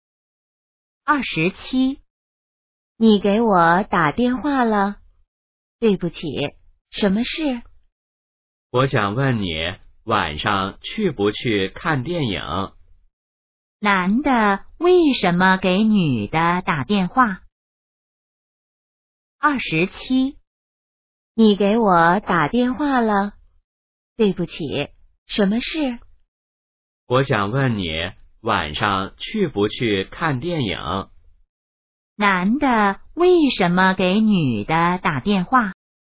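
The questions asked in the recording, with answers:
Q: 男的为什么给女的打电话?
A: 想问她晚上去不去看电影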